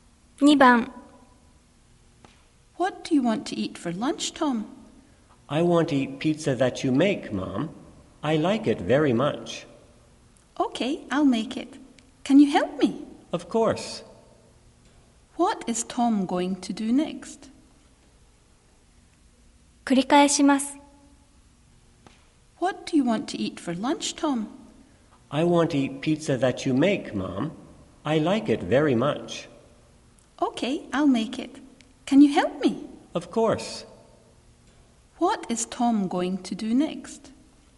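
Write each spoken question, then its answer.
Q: What is Tom going to do next?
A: Help his mother make pizza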